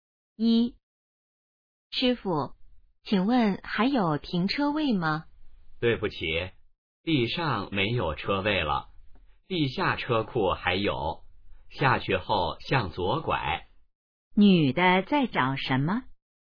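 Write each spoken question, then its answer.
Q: 女的在找什么?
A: 停车位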